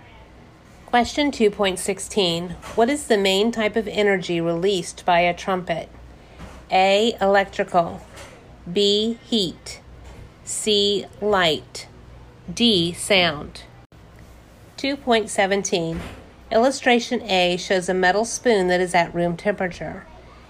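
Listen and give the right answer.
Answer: D: Sound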